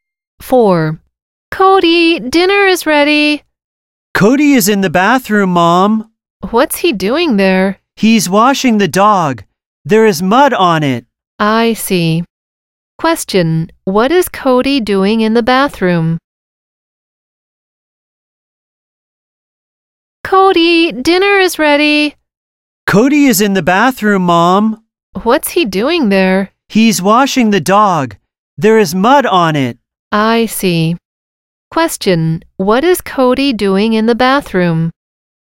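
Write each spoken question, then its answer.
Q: What is Cody doing in the bathroom?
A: Washing the dog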